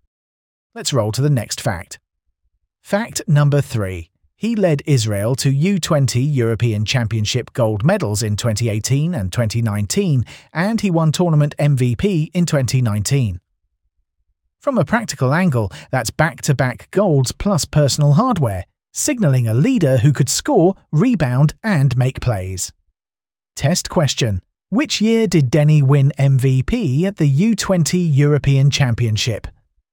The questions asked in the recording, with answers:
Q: Which year did Denny win MVP at the U20 European Championship?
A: Correct answer, 2019.